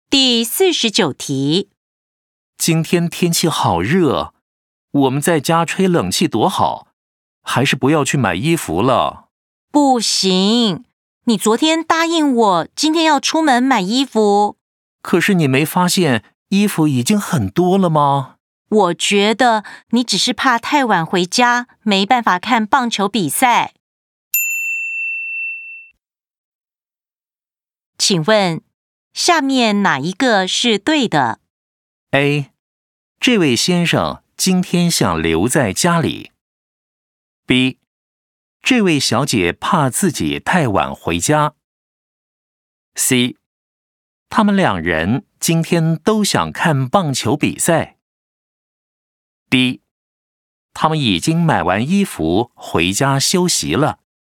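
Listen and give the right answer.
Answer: A: 这位先生今天想留在家里。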